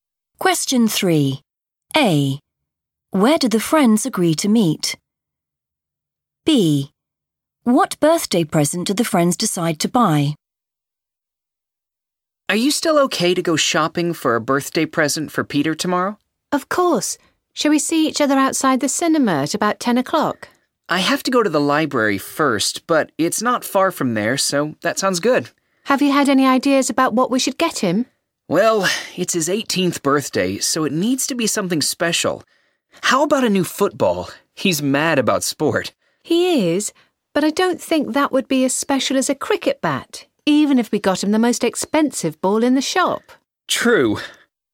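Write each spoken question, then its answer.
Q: Where do the friends agree to meet?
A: outside the cinema

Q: What birthday present do the friends decide to buy?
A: a cricket bat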